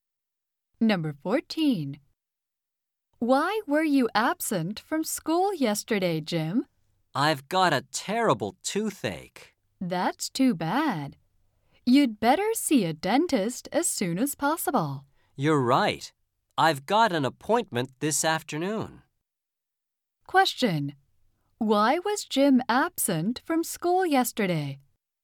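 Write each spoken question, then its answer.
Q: Why was Jim absent from school yesterday?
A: He had a terrible toothache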